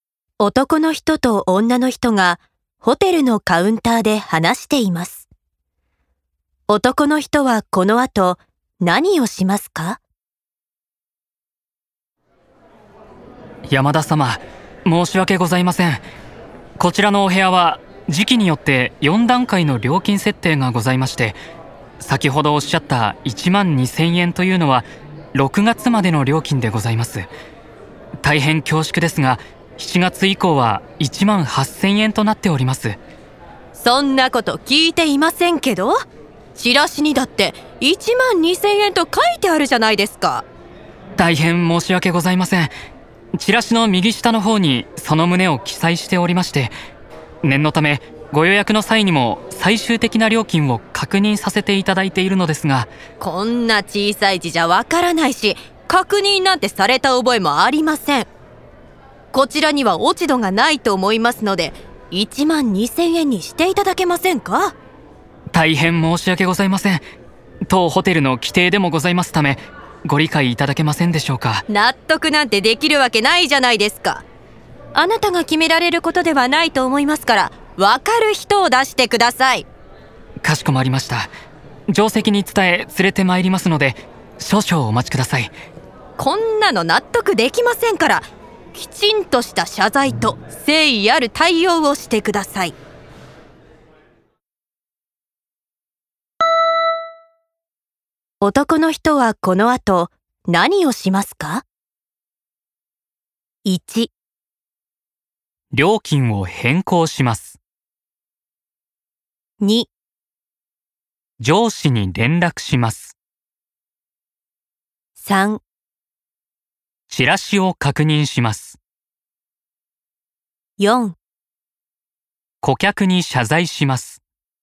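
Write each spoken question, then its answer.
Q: 男の人はこの後何をしますか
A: 2: 上司に連絡します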